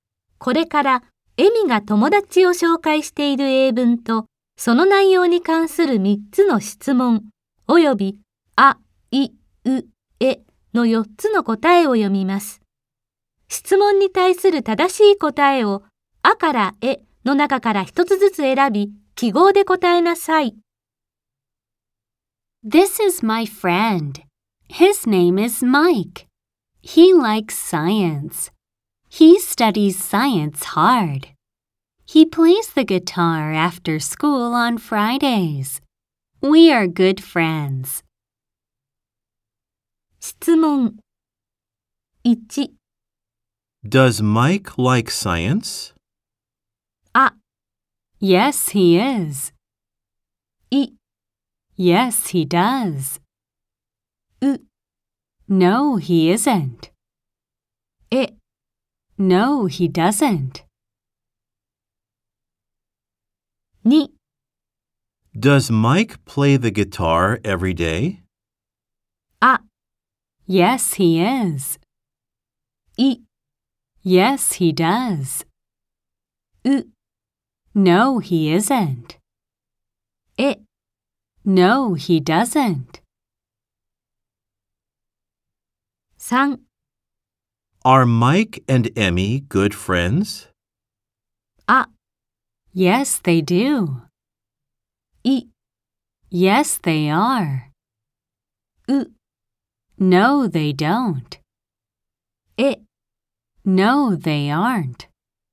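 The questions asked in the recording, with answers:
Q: Does Mike like science?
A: い: Yes, he does.

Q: Does Mike play the guitar every day?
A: え: No, he doesn't.

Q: Are Mike and Emmy good friends?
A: い: Yes, they are.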